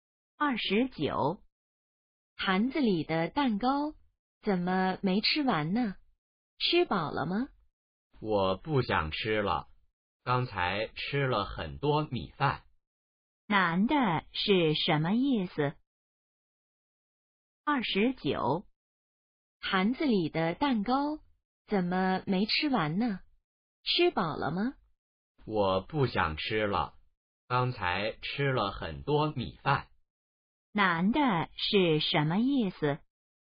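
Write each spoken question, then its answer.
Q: 男的是什么意思?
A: 他吃饱了,不想吃了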